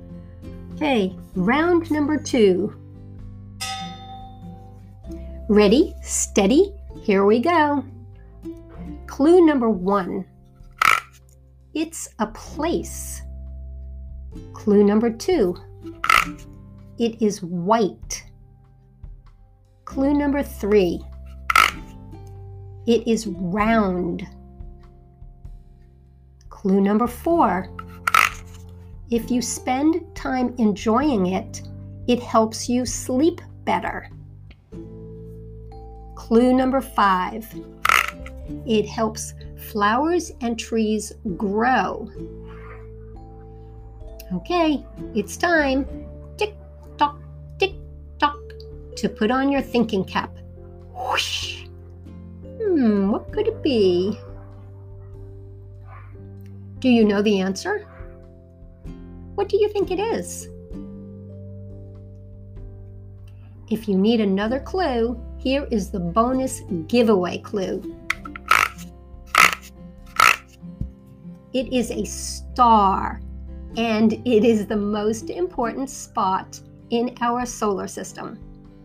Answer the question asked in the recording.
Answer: Did you say the sun?